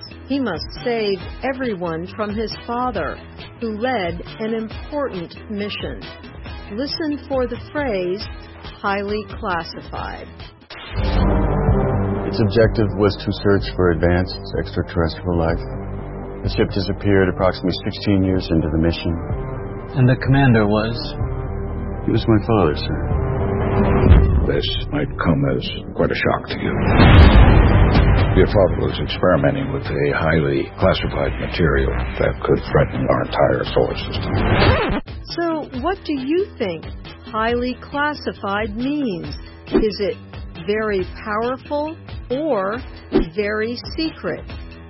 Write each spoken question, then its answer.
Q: So, what do you think highly classified means?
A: Highly classified means very secret.